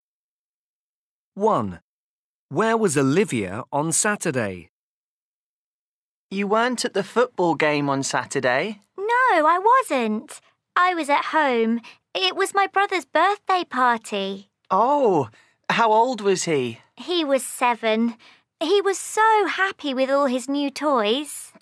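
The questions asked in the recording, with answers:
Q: Where was Olivia on Saturday?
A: At home (her brother's birthday party)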